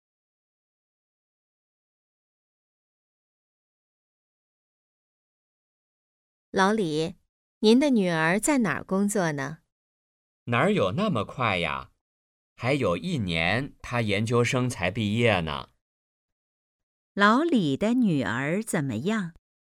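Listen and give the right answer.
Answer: 还在读研究生,一年后毕业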